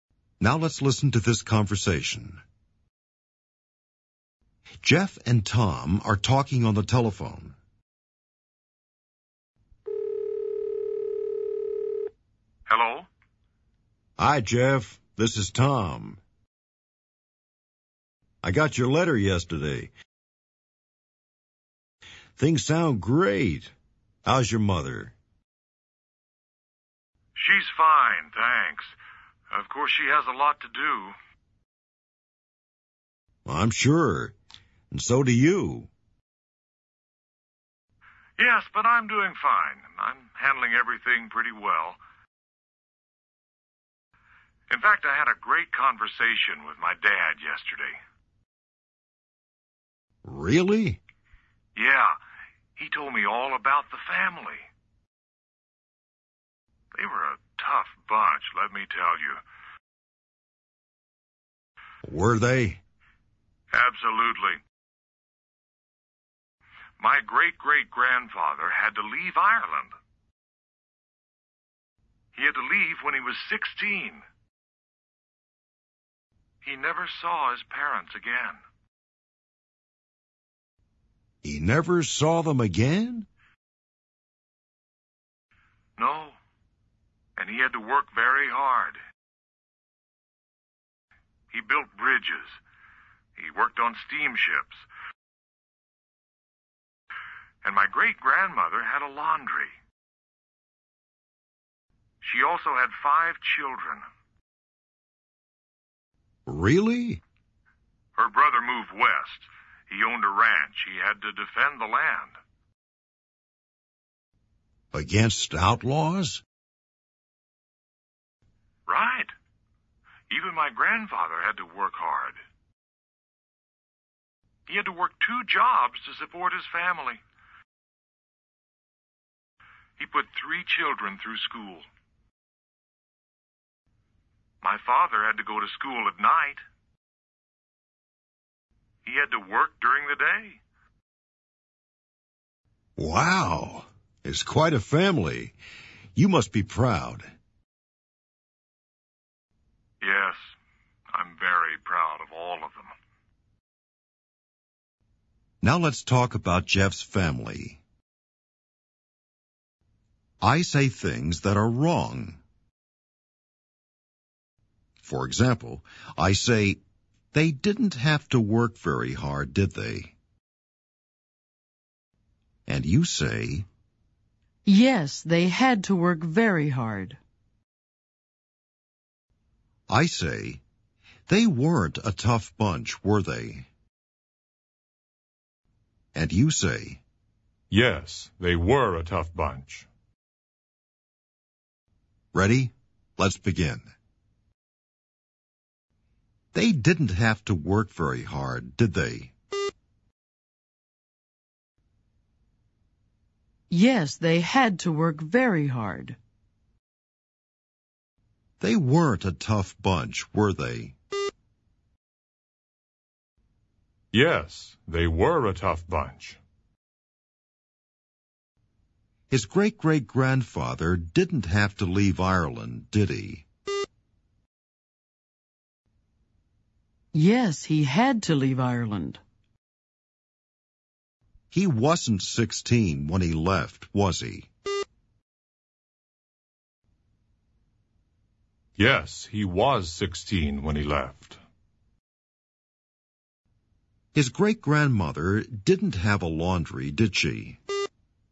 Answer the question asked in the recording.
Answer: Yes, she had a laundry.